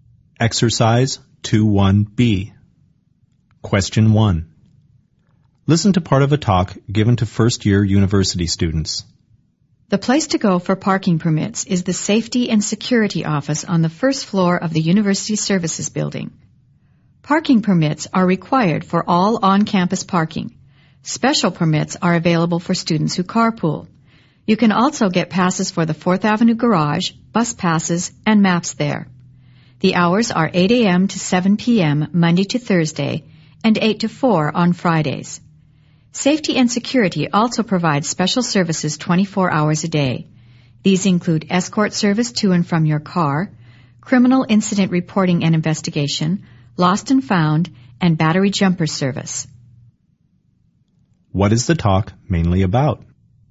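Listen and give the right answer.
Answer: The services of the Safety and Security Office (parking permits, etc.)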